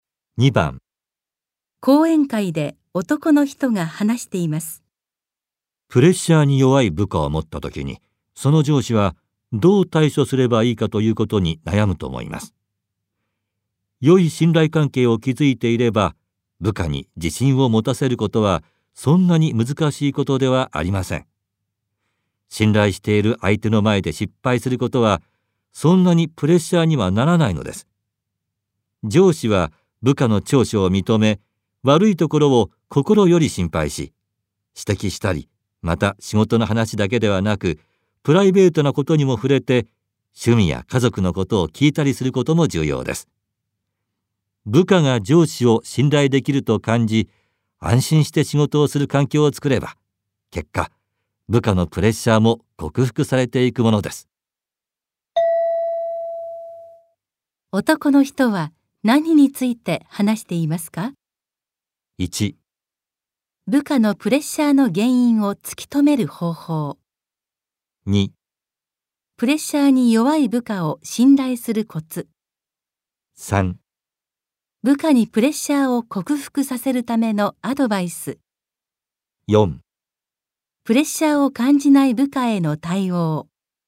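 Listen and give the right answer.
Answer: 3: 部下にプレッシャーを克服させるためのアドバイス。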